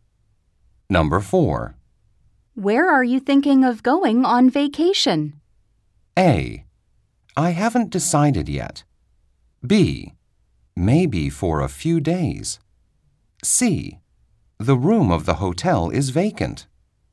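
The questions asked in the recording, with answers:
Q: Where are you thinking of going on vacation?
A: A: I haven't decided yet.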